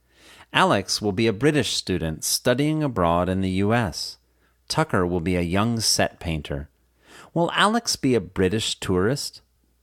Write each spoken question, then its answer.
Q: Will Alex be a British tourist?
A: No, Alex won't be a British tourist.